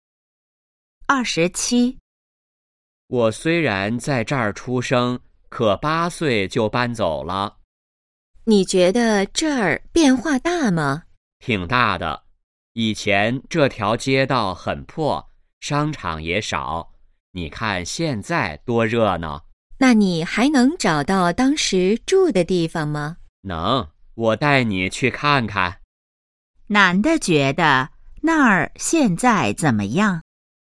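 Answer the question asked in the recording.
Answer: 很热闹,变化很大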